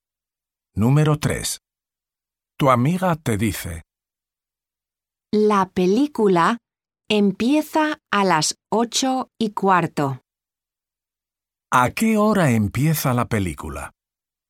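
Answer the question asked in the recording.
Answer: a las 8:15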